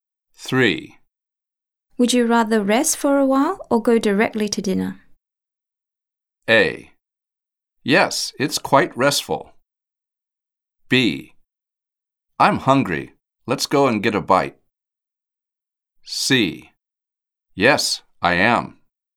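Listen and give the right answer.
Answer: B: I'm hungry. Let's go and get a bite.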